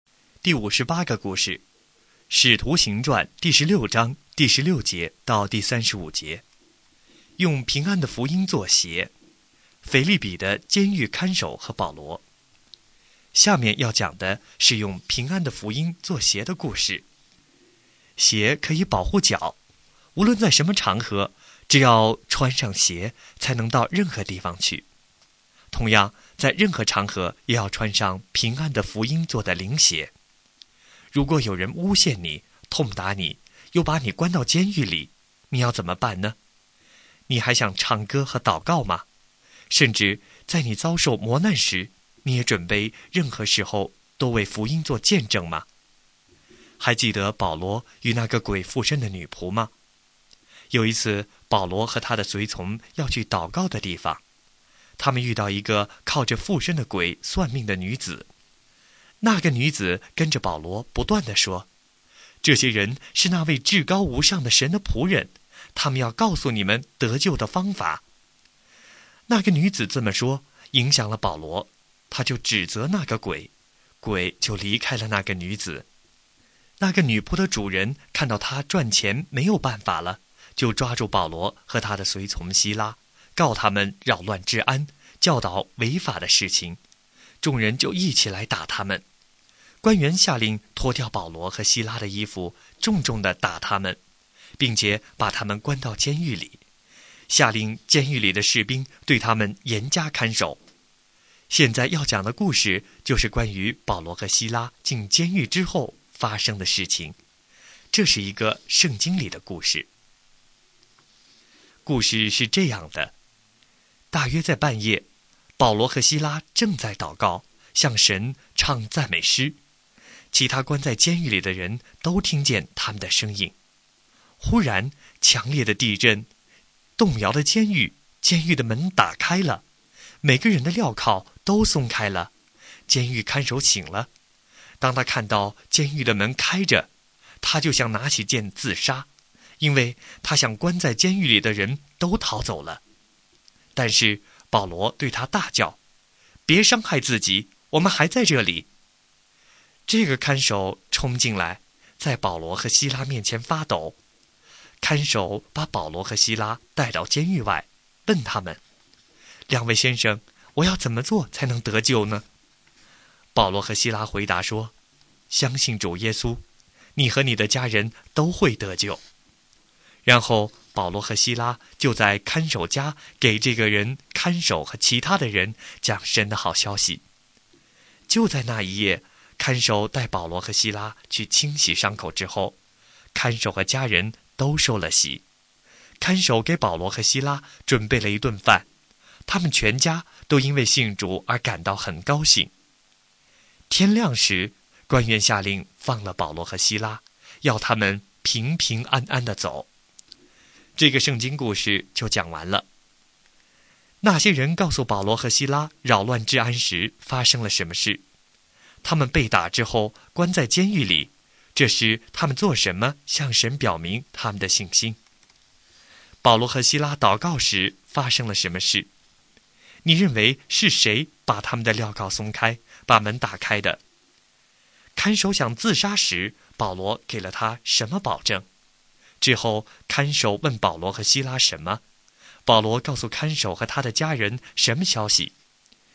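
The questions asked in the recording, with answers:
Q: 他们被打之后关在监狱里,这时他们做什么向神表明他们的信心。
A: 祷告,向神唱赞美诗

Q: 保罗和希拉祷告时发生了什么事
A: 发生强烈地震,监狱的门打开了,每个人的镣铐都松开了

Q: 看守想自杀时,保罗给了他什么保证?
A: 别伤害自己,我们还在这里

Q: 之后看守问保罗和希拉什么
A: 我要怎么做才能得救

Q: 保罗告诉看守和他的家人什么消息。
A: 相信主耶稣,你和你的家人都会得救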